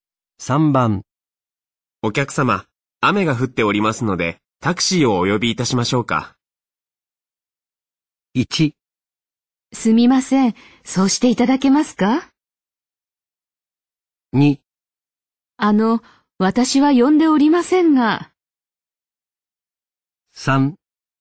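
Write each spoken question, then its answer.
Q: お客様、雨が降っておりますので、タクシーをお呼びいたしましょうか。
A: 1: すみません。そうしていただけますか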